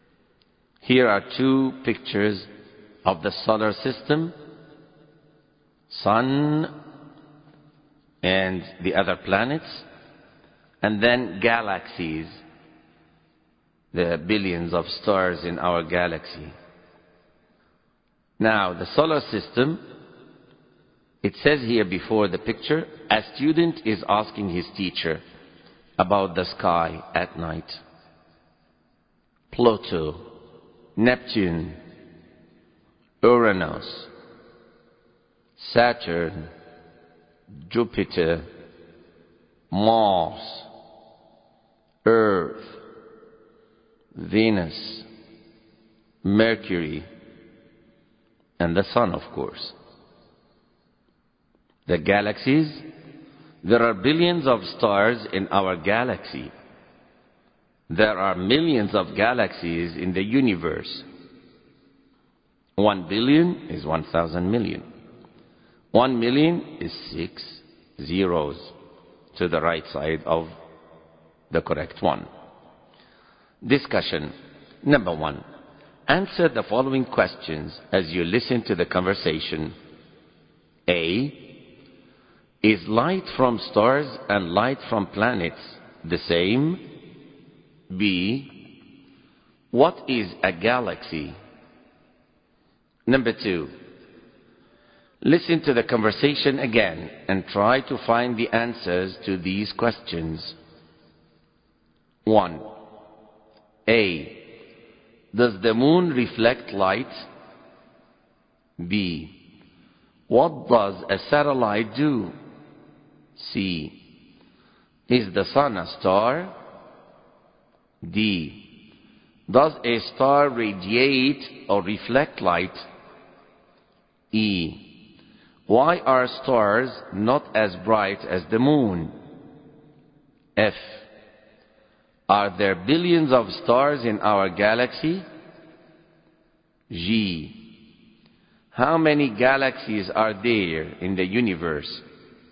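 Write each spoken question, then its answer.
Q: Are there billions of stars in our galaxy?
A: Yes

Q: How many galaxies are there in the universe?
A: Millions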